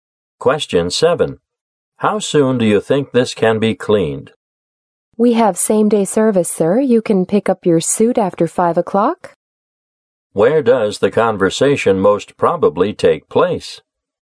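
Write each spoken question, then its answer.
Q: Where does the conversation most probably take place?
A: At a dry cleaner's.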